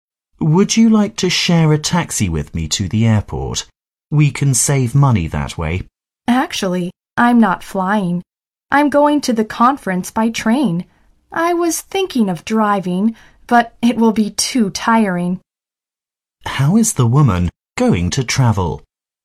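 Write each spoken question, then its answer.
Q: How is the woman going to travel?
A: By train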